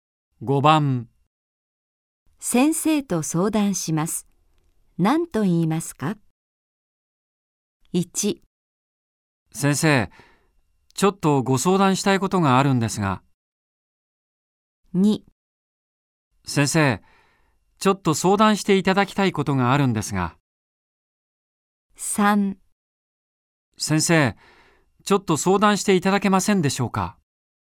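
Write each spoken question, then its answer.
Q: 先生と相談します。何と言いますか?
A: 1: 先生、ちょっとご相談したいことがあるんですが。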